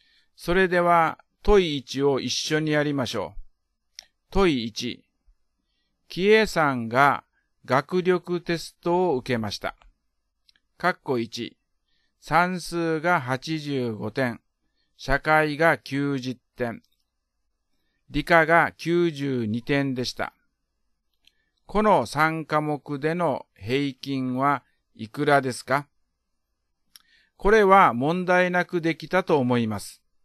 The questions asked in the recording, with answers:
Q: この3科目での平均はいくらですか?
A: 89点が答えです。